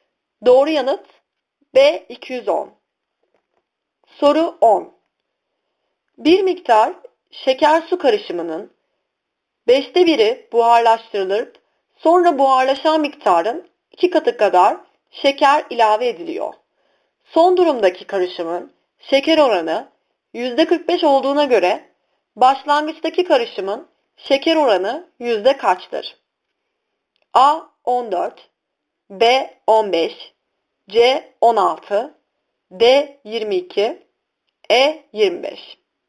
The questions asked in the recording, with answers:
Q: Son durumdaki karışımın şeker oranı %45 olduğuna göre başlangıçtaki karışımın şeker oranı yüzde kaçtır?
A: Doğru yanıt A 14.